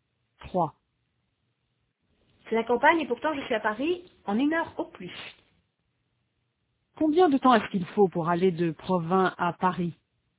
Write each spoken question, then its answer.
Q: Combien de temps est-ce qu'il faut pour aller de Provins à Paris?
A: Une heure au plus.